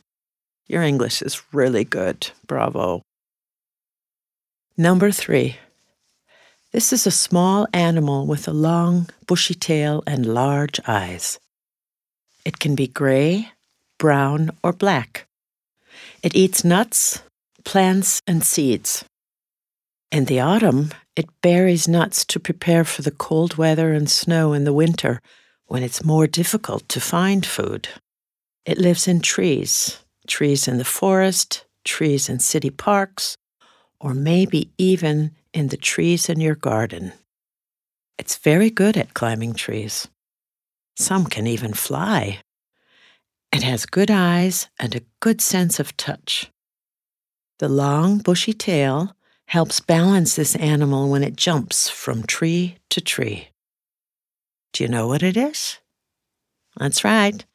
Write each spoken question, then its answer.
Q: Do you know what it is?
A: It's a squirrel.